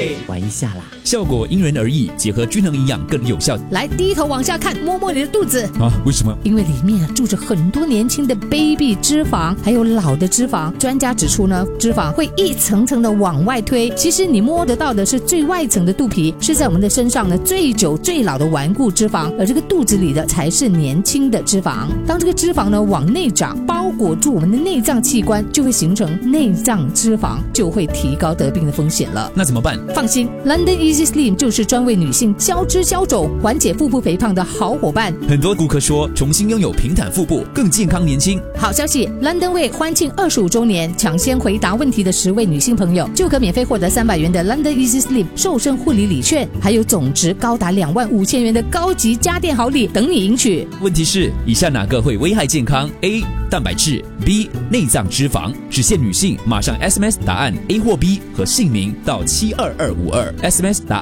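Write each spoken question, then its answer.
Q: 以下哪个会危害健康 ?A. 蛋白质 ,B. 内脏脂肪。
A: B: 内脏脂肪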